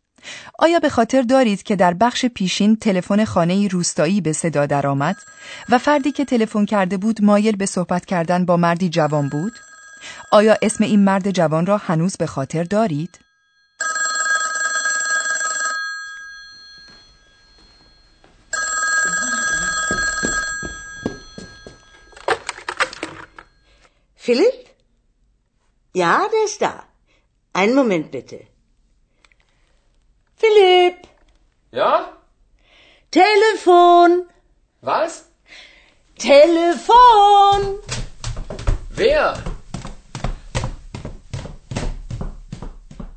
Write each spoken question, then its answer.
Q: آیا اسم این مرد جوان را هنوز به خاطر دارید؟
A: پس متوجه شدیم که اسم این مرد جوان فیلیپ است.